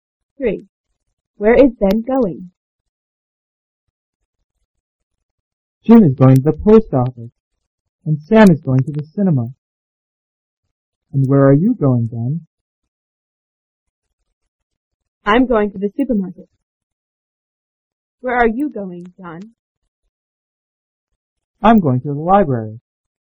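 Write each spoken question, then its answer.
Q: Where is Ben going?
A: To the supermarket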